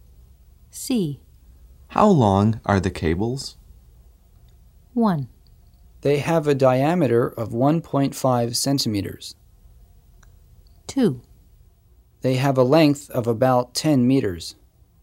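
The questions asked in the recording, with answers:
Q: How long are the cables?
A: 2: They have a length of about 10 meters.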